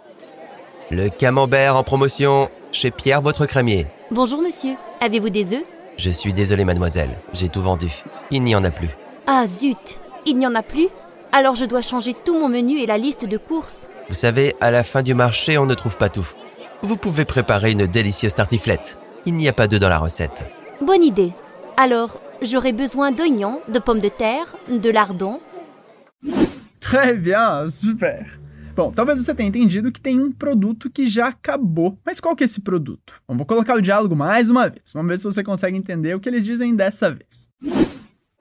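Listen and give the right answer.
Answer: Ovos (des œufs)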